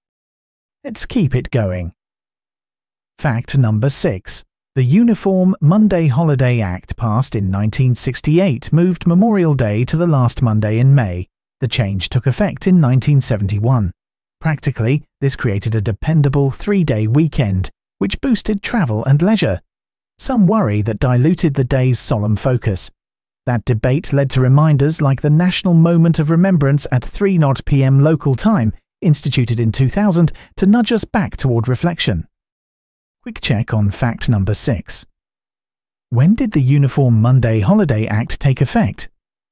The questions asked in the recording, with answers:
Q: When did the Uniform Monday Holiday Act take effect?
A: 1971.